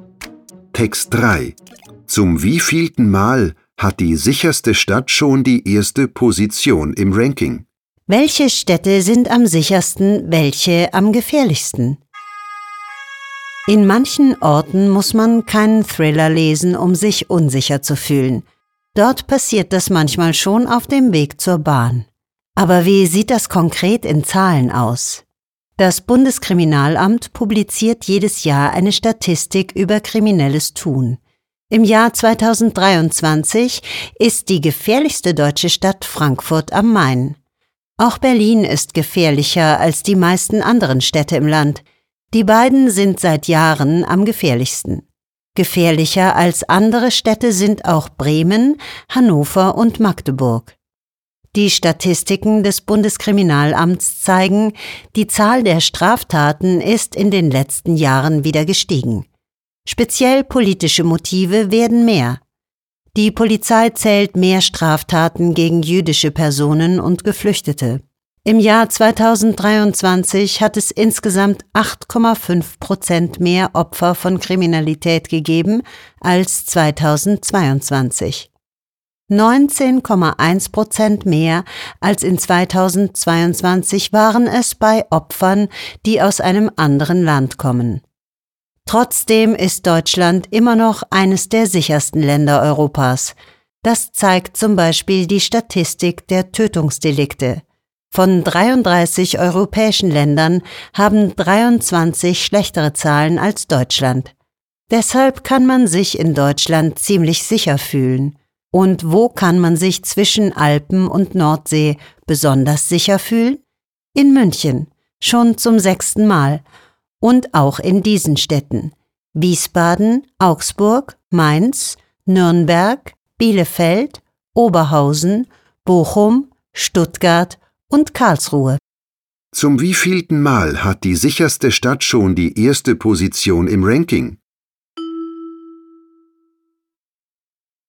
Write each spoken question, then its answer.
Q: Zum wievielten Mal hat die sicherste Stadt schon die erste Position im Ranking?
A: Damit ist die Stadt zum sechsten Mal die sicherste Stadt in Deutschland.